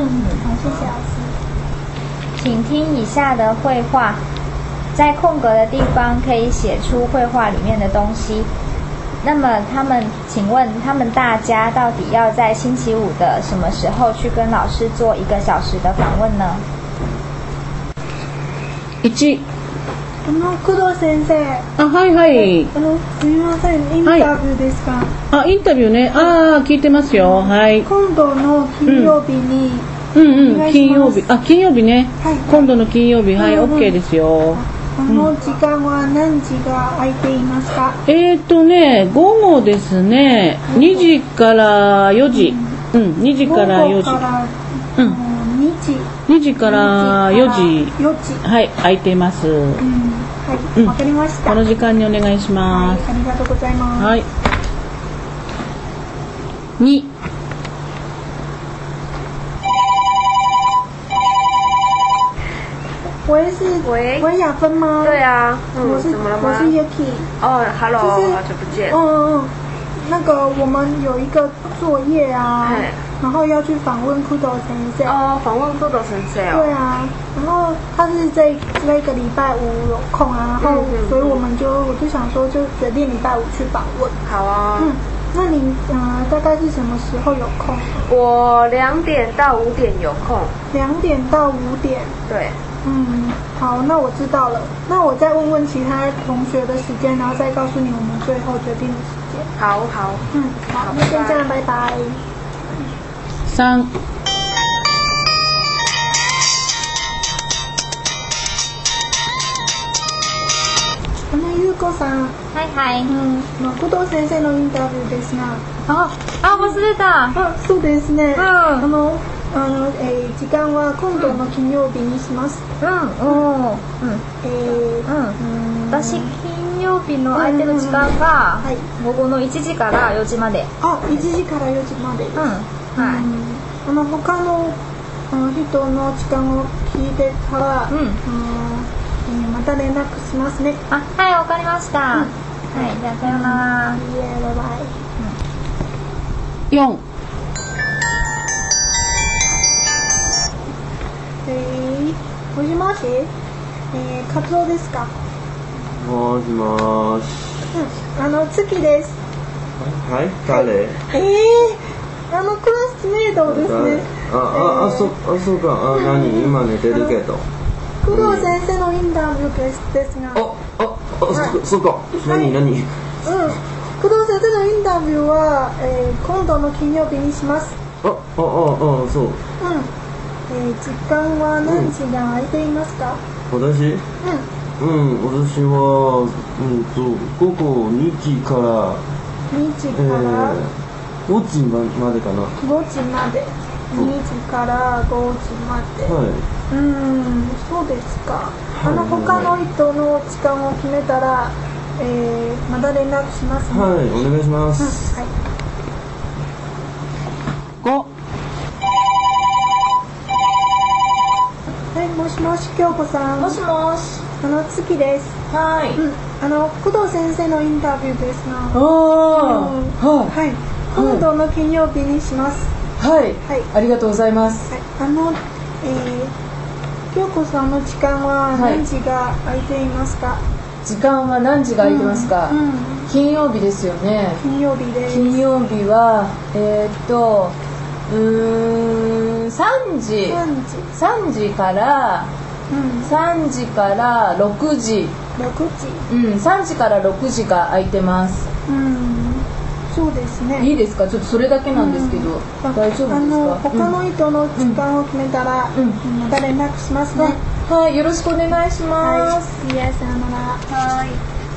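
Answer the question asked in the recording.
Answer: 星期五下午三点到四点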